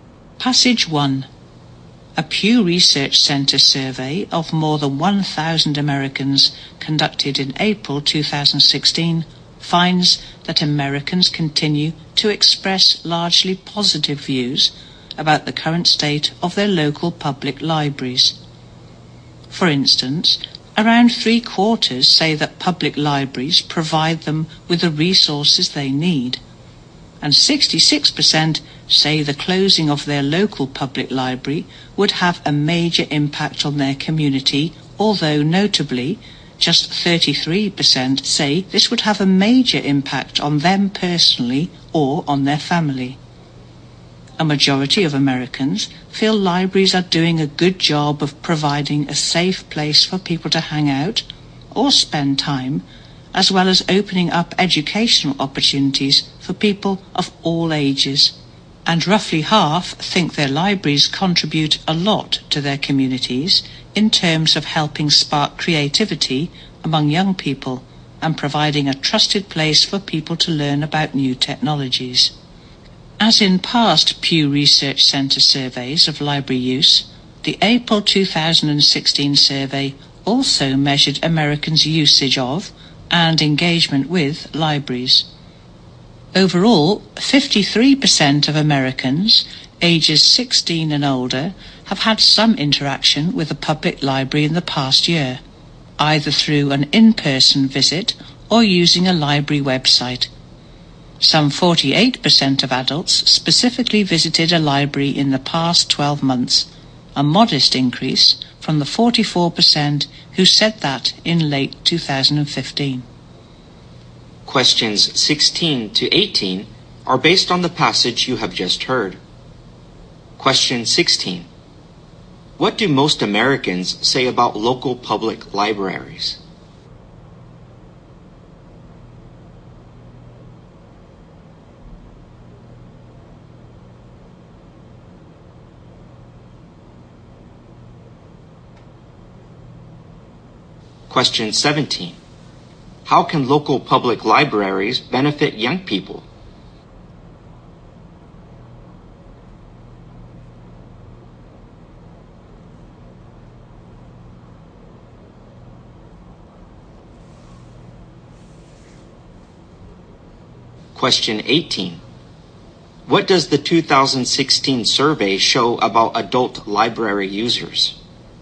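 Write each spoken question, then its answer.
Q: What do most Americans say about local public libraries?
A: They provide the resources people need

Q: How can local public libraries benefit young people?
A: By helping spark their creativity

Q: What does the 2016 survey show about adult library users?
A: Their number increased a little (48%, up from 44%)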